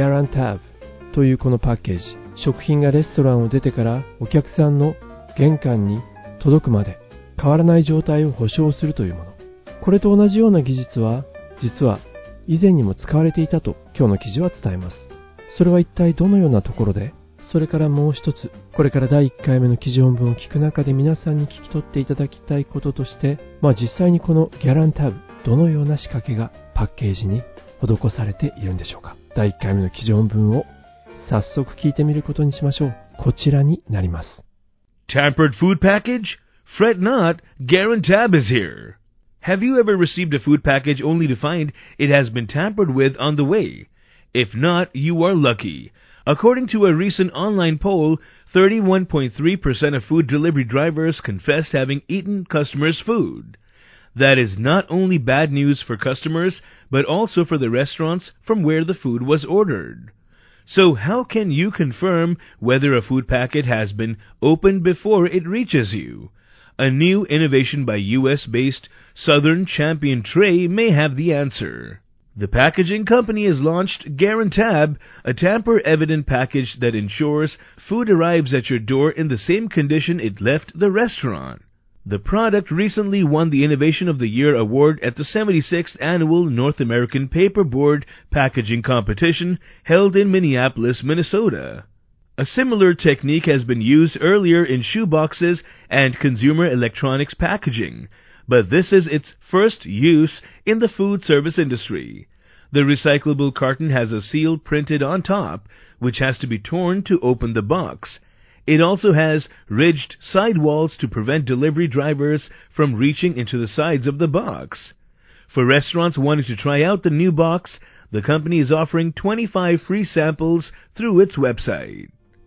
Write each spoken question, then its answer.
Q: これと同じような技術は実は以前にも使われていたと今日の記事は伝えます。 それは一体どのようなところで。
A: A similar technique has been used earlier in shoeboxes and consumer electronics packaging.

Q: まあ実際にこのギャランタブ、どのような仕掛けがパッケージに施されているんでしょうか。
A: Recyclable carton has a seal printed on top, which has to be torn to open the box.